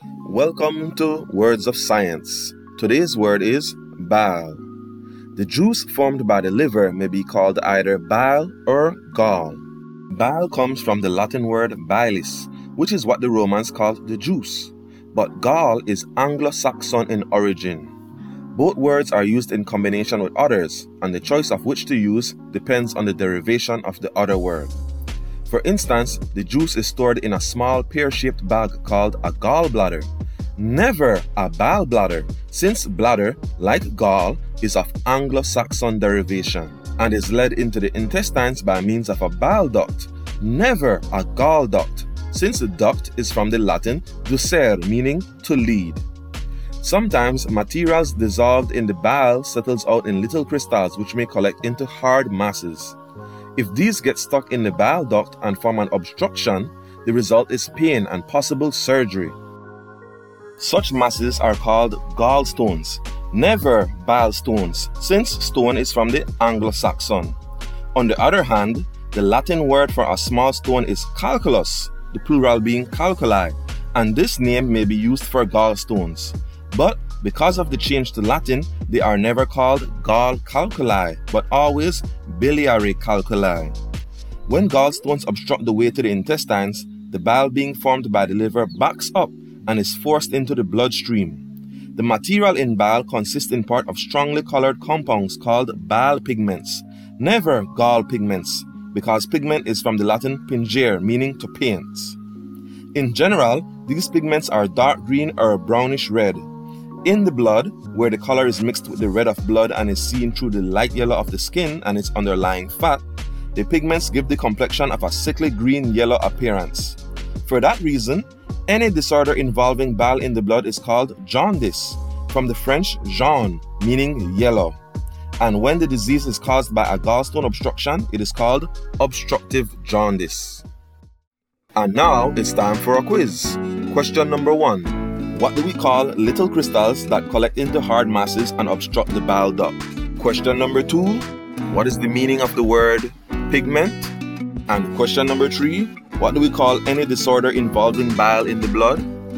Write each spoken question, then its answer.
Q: What do we call little crystals that collect into hard masses and obstruct the bile duct?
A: for question number one, gallstones.

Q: what is the meaning of the word pigment?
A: For question number two, it means to paint.

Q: what do we call any disorder involving bile in the blood?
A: And for question number three, the answer is jaundice.